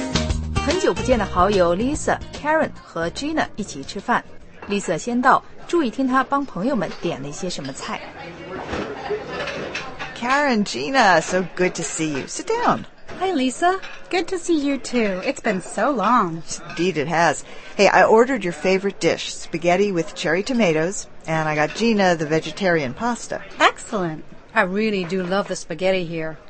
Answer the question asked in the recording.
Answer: Lisa 最早一个到,已经帮 Karen 和 Gina 点好了他们最爱吃的菜。